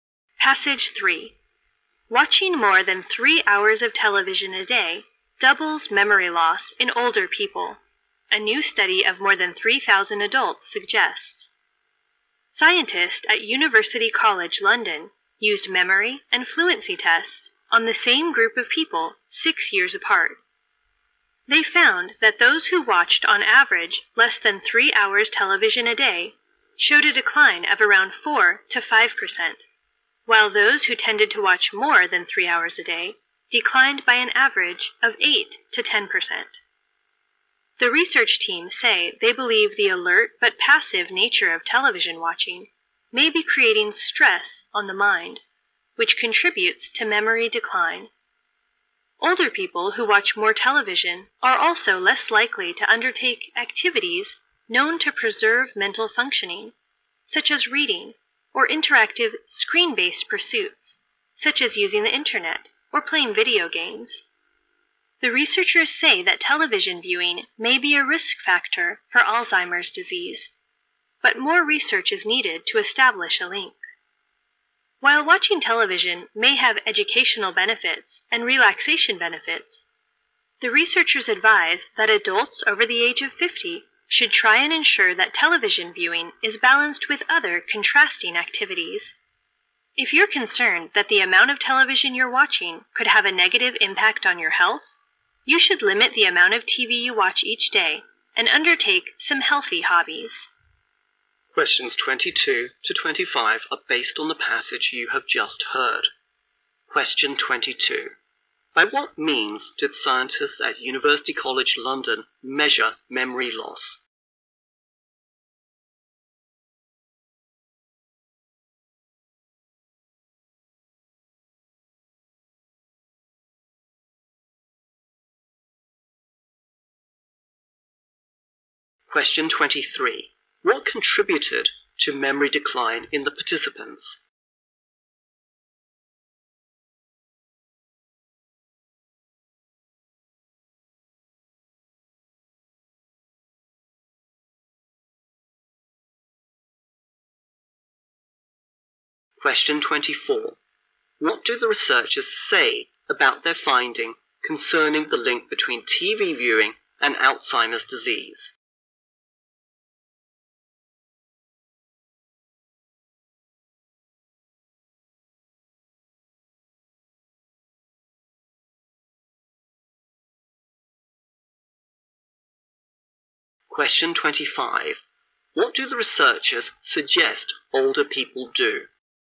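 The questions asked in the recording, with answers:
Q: By what means did scientists at University College London measure memory loss?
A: Memory and fluency tests 6 years apart

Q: What contributed to memory decline in the participants?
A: Stress on the mind from the alert but passive nature of TV watching

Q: What do the researchers say about their finding concerning the link between TV viewing and Alzheimer's disease?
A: More research is needed to establish a link

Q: What do the researchers suggest older people do?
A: Balance TV viewing with other contrasting activities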